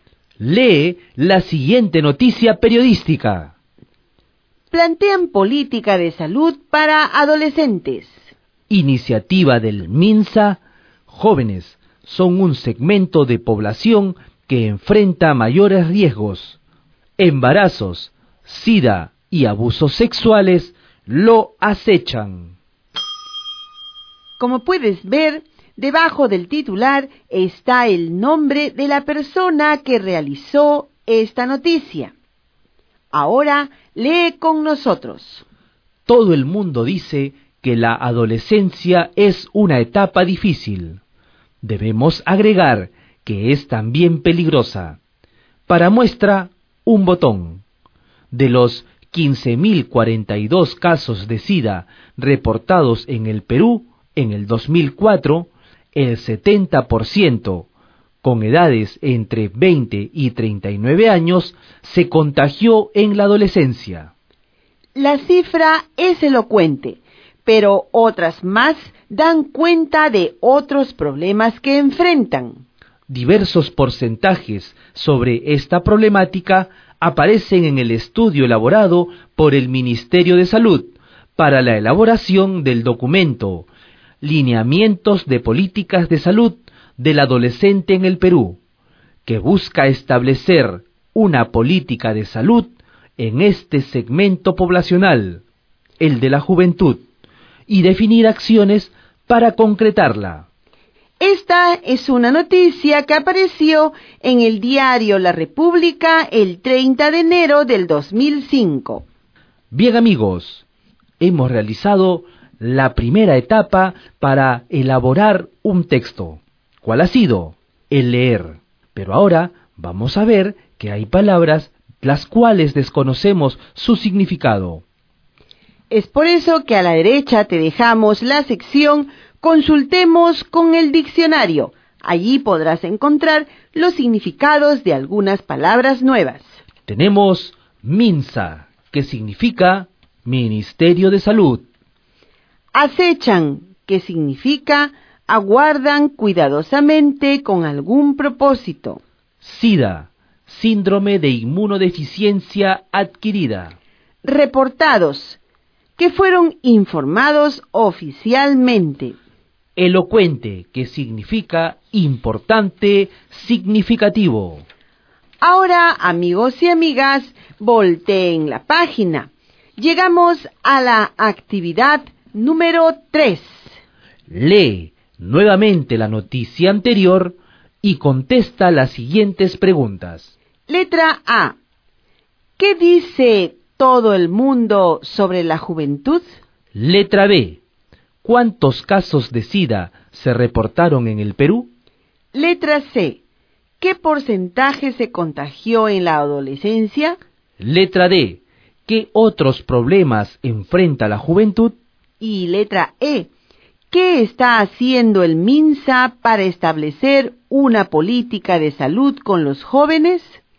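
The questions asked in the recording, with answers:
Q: ¿Qué dice todo el mundo sobre la juventud?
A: Que la adolescencia es una etapa difícil

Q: ¿Cuántos casos de SIDA se reportaron en el Perú?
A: 15.042 casos en 2004

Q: ¿Qué porcentaje se contagió en la adolescencia?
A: El 70%

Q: ¿Qué otros problemas enfrenta la juventud?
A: Embarazos y abusos sexuales

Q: ¿Qué está haciendo el MINSA para establecer una política de salud con los jóvenes?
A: Elaboró un estudio para el documento Lineamientos de Políticas de Salud del Adolescente en el Perú y definirá acciones para concretarla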